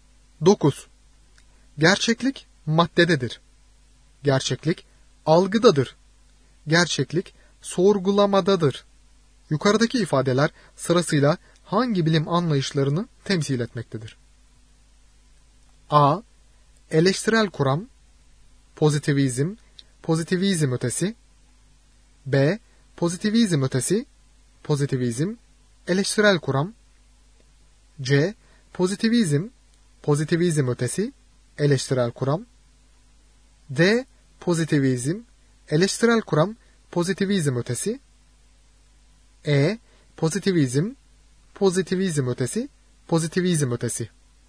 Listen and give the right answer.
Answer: Doğru yanıt C şıkkı. Pozitivizm, pozitivizm ötesi, eleştirel kuram.